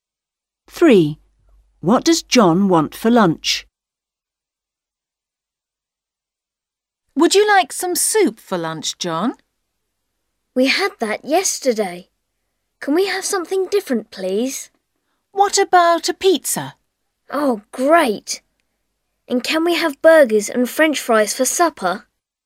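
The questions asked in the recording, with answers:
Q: What does John want for lunch?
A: Pizza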